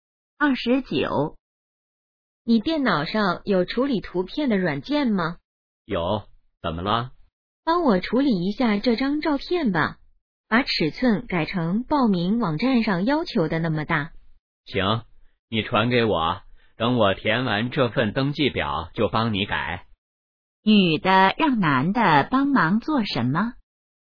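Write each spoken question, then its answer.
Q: 女的让男的帮忙做什么?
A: 处理照片,改尺寸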